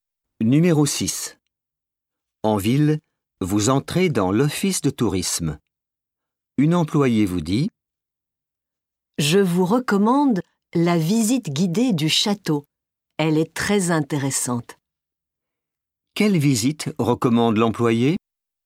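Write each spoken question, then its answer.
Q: Quelle visite recommande l'employée?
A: La visite guidée du château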